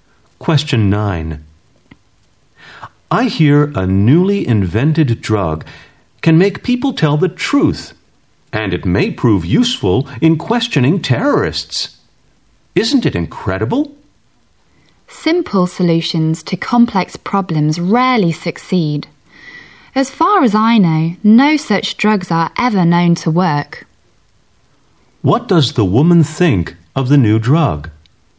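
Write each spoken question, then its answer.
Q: What does the woman think of the new drug?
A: She doubts it will work.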